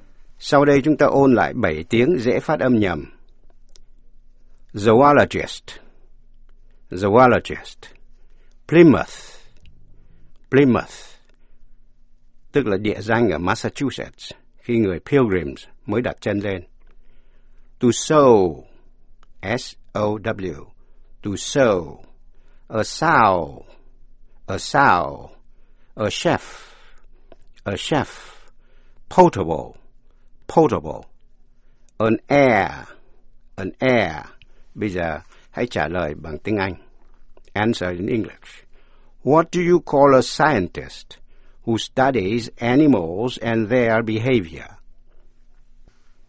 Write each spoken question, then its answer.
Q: What do you call a scientist who studies animals and their behavior?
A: Quý vị có trả lời là a zoologist.